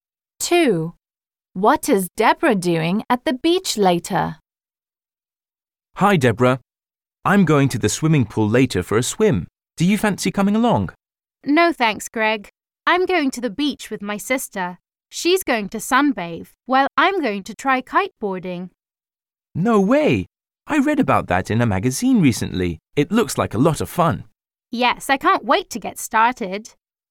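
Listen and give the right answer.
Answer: Trying kiteboarding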